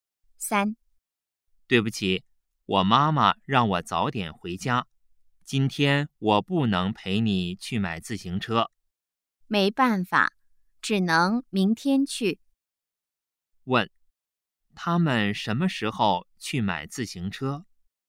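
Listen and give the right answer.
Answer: 明天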